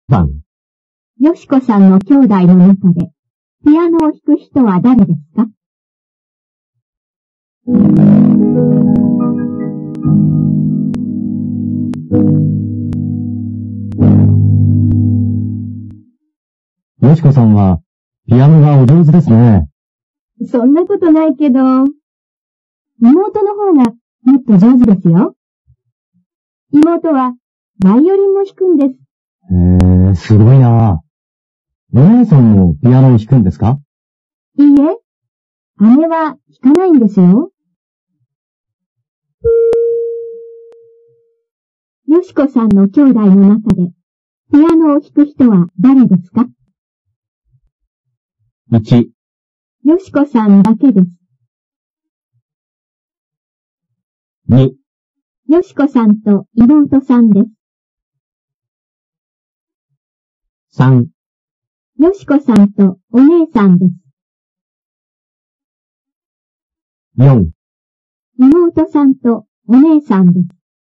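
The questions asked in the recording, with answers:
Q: よしこさんの兄弟の中でピアノを弾く人は誰ですか?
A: 2: よしこさんと妹さんです。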